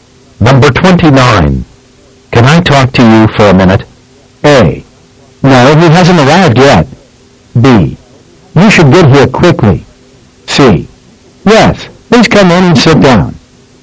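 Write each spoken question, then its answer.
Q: Can I talk to you for a minute?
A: C: Yes, please come in and sit down.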